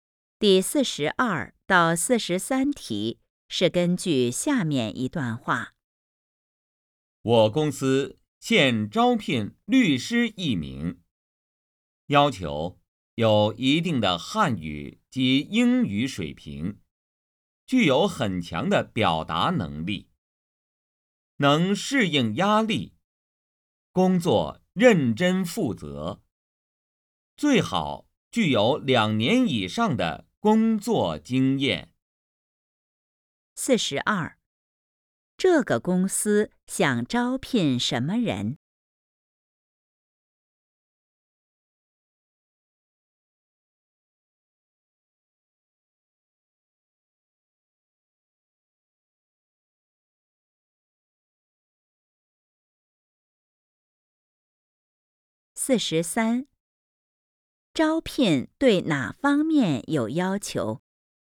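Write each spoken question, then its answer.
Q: 这个公司想招聘什么人?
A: 律师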